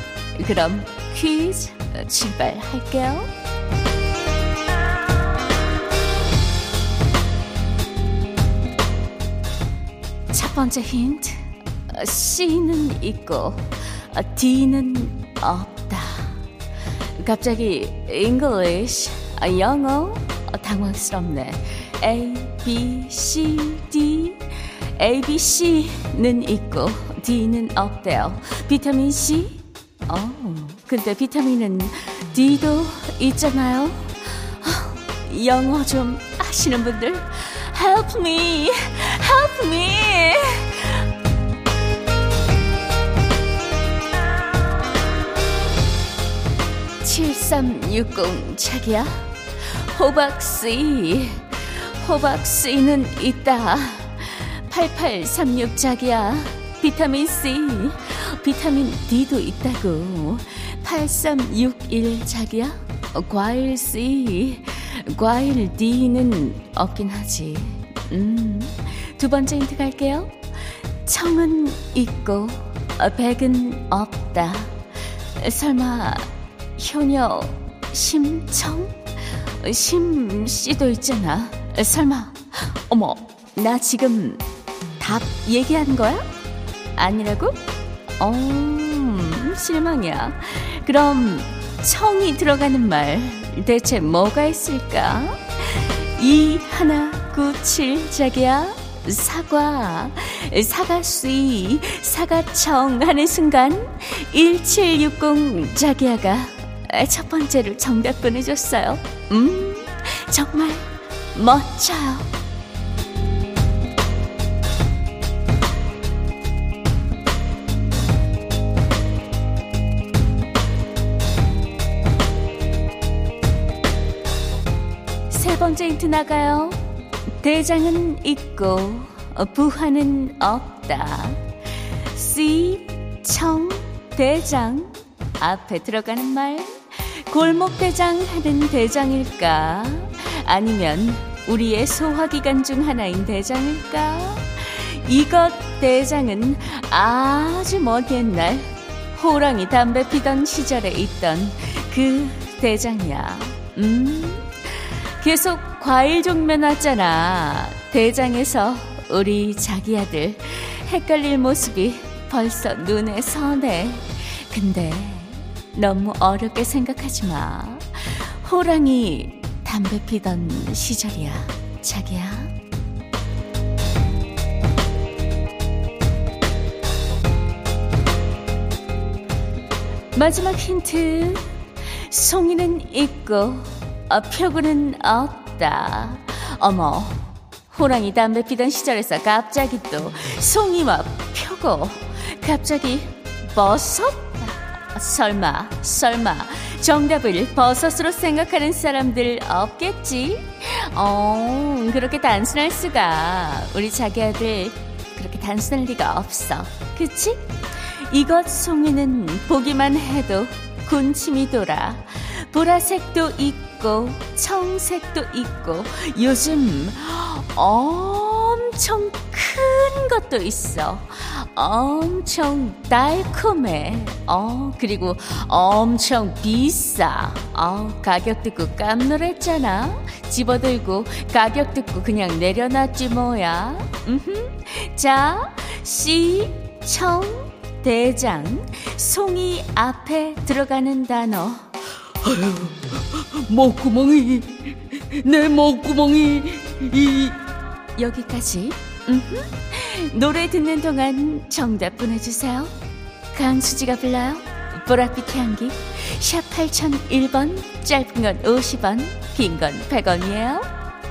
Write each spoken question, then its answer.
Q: 자, 시, 청, 대장. 송이 앞에 들어가는 단어.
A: 정답은 포도였습니다.